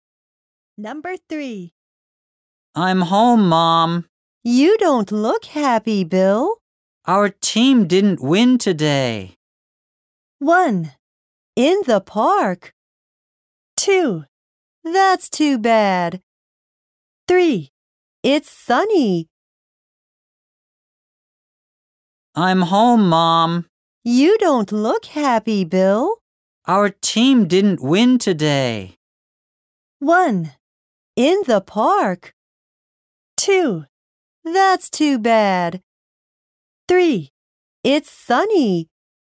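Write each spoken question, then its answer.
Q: Our team didn't win today.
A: 2: That's too bad.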